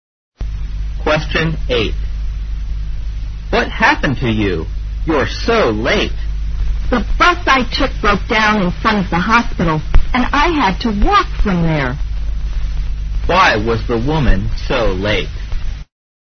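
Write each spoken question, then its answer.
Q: Why was the woman so late?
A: Her bus broke down and she had to walk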